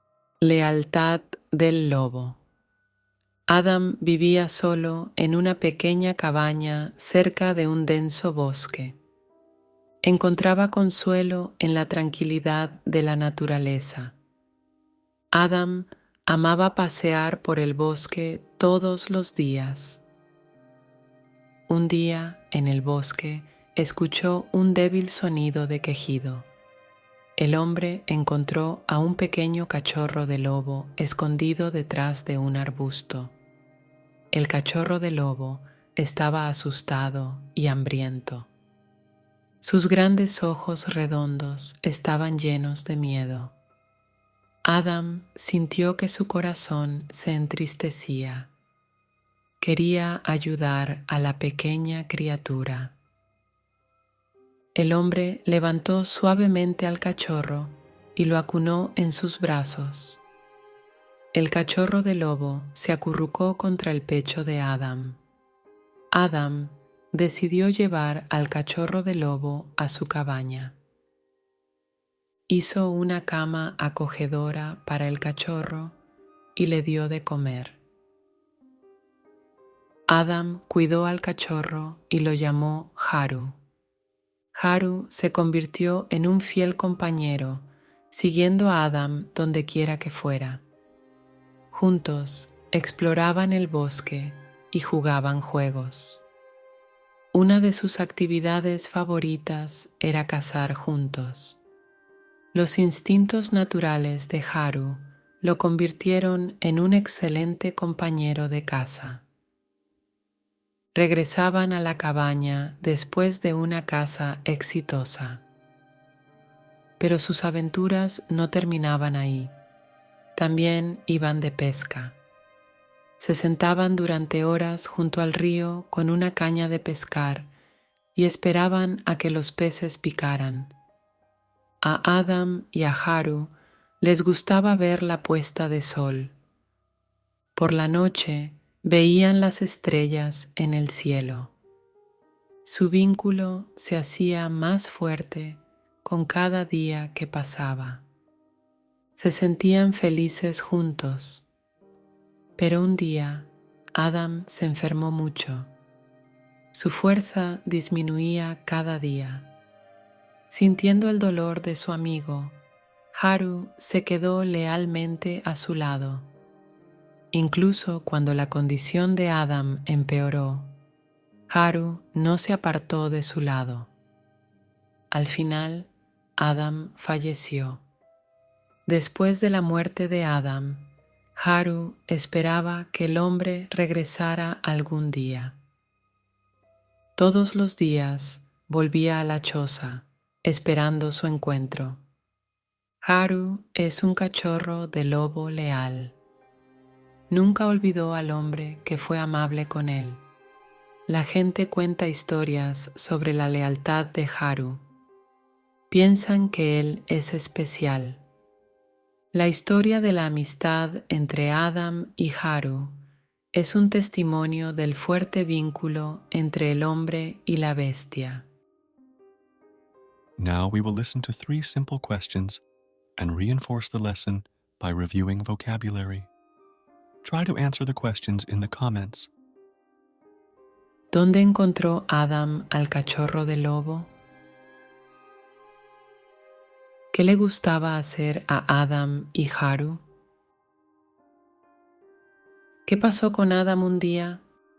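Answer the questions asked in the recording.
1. En el bosque, escondido detrás de un arbusto
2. Explorar el bosque, cazar y pescar juntos, y ver la puesta de sol
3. Se enfermó mucho (y al final falleció)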